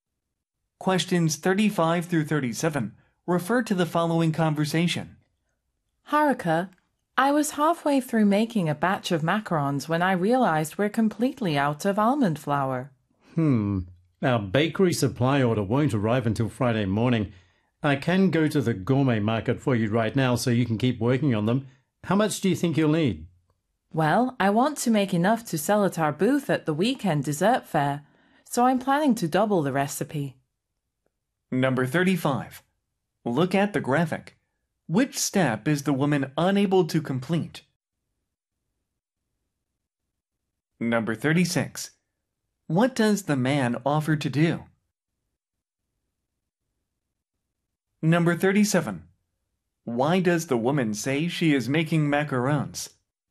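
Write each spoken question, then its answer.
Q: What does the man offer to do?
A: Go to the gourmet market to buy almond flour.

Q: Why does the woman say she is making macarons?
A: To sell at their booth at the weekend dessert fair.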